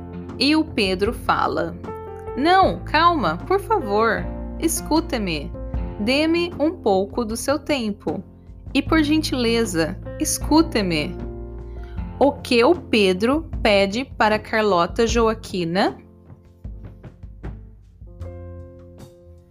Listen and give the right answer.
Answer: Ele pede para ela ficar calma e para escutá-lo ele pede um pouco do tempo da Carlota Joaquina.